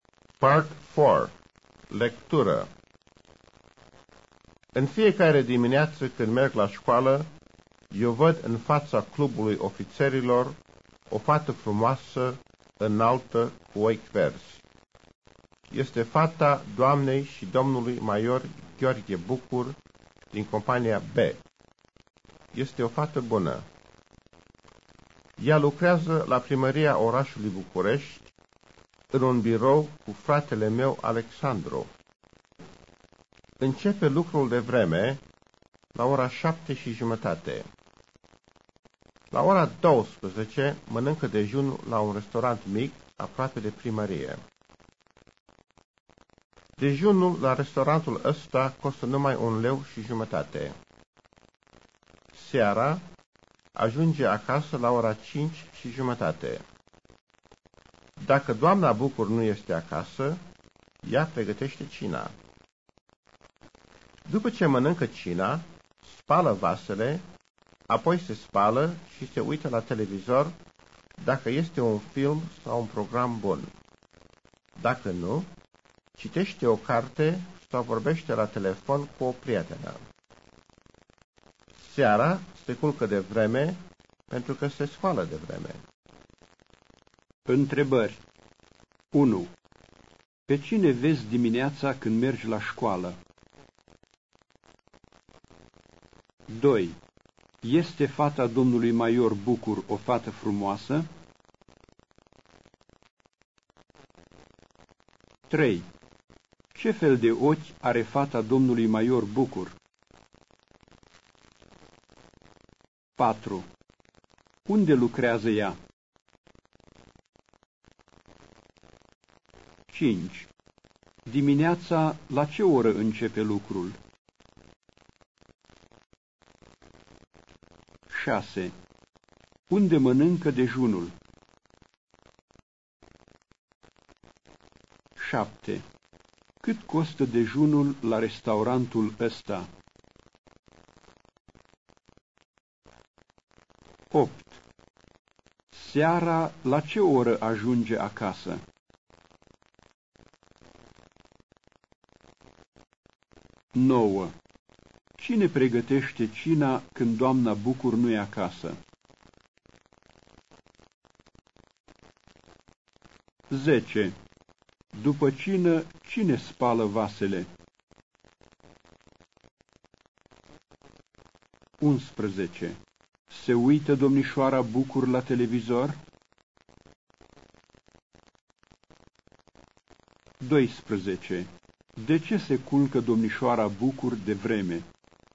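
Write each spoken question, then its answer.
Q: Pe cine vezi dimineața când mergi la școală?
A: O fată frumoasă, înaltă, cu ochi verzi, fata maiorului Bucur

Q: Este fata domnului Maior Bucur o fată frumoasă?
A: Da

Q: Ce fel de ochi are fata domnului Maior Bucur?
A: Ochi verzi

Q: Unde lucrează ea?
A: La primăria orașului București

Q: Dimineața, la ce oră începe lucrul?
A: La ora 7:30

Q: Unde mănâncă dejunul?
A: La un restaurant mic, aproape de primărie

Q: Cât costă dejunul la restaurantul ăsta?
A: 1,50 lei

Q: Seara, la ce oră ajunge acasă?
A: La ora 5:30

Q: Cine pregătește cina când doamna Bucur nu e acasă?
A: Fata (domnișoara Bucur)

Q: După cină, cine spală vasele?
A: Fata (domnișoara Bucur)

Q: Se uită domnișoara Bucur la televizor?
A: Da, dacă este un film sau un program bun

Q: De ce se culcă domnișoara Bucur de vreme?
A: Pentru că se scoală de vreme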